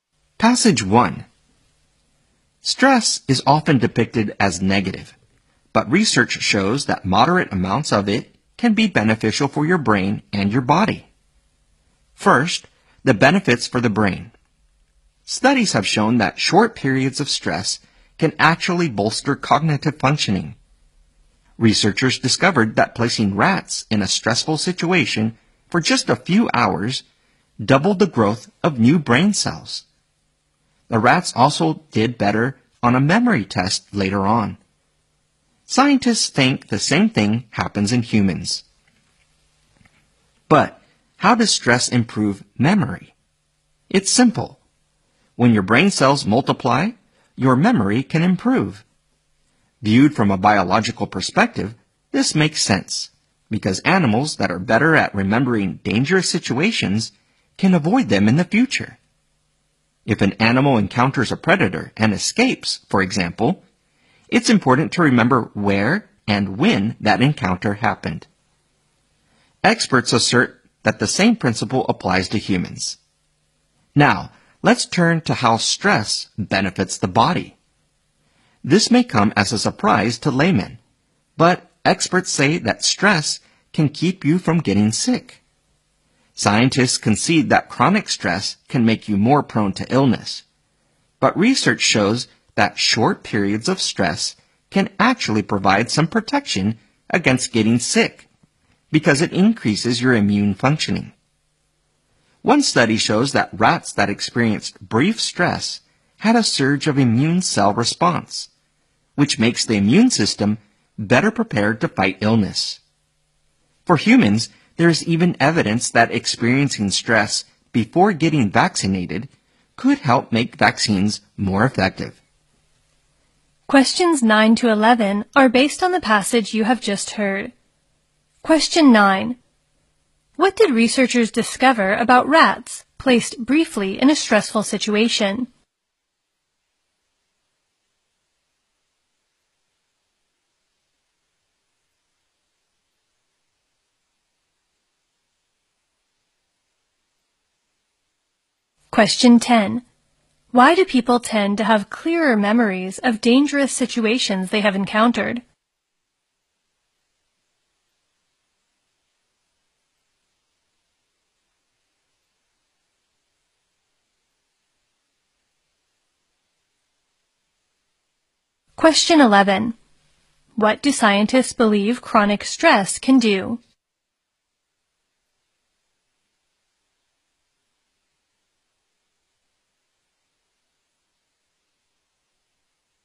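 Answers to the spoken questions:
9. Their growth of new brain cells doubled.
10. Stress makes brain cells multiply, which improves memory and helps them avoid danger in the future.
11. Make you more prone to illness.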